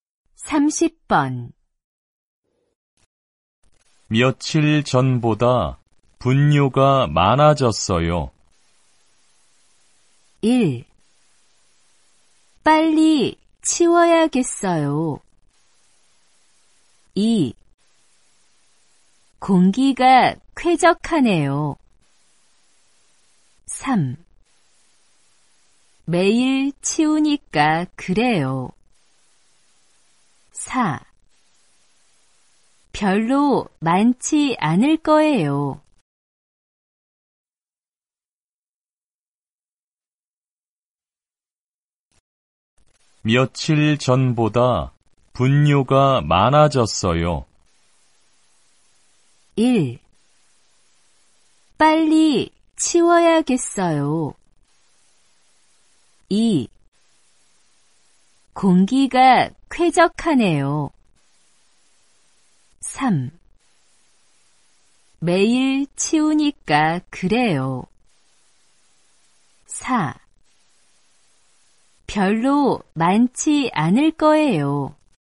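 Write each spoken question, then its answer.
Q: 며칠 전보다 분뇨가 많아졌어요.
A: 1: 빨리 치워야겠어요.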